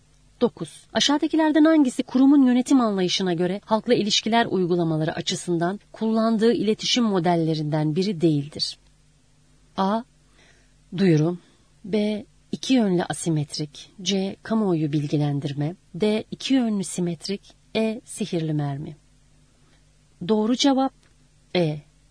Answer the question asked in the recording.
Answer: Doğru cevap E.